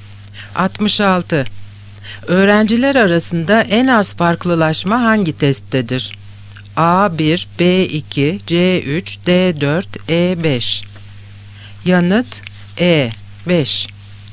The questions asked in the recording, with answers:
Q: Öğrenciler arasında en az farklılaşma hangi testtedir?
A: Yanıt E 5.